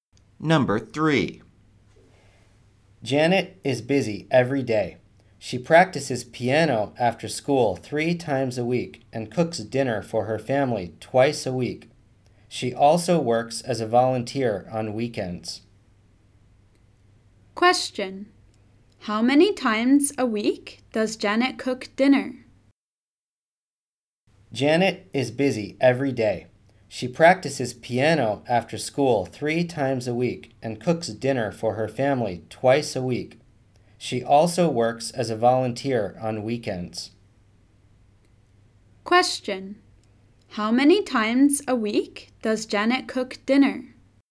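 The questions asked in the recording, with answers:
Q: How many times a week does Janet cook dinner?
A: Twice a week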